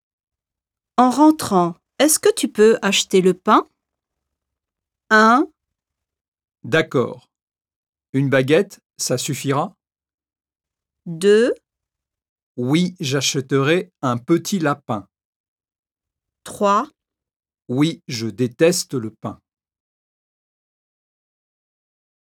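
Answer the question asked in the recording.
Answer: 1: D'accord. Une baguette, ça suffira?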